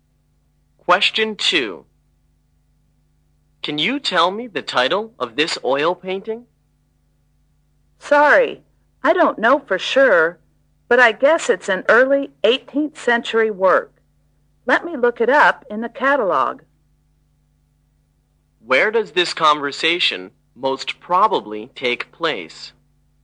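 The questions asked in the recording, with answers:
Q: Where does this conversation most probably take place?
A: In an art gallery or museum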